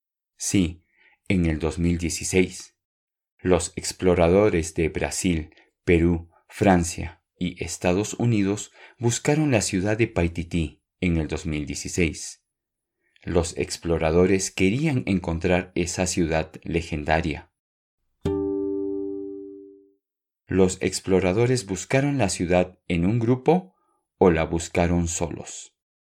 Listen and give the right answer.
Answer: Sí, tienes razón, buscaron la ciudad en un grupo.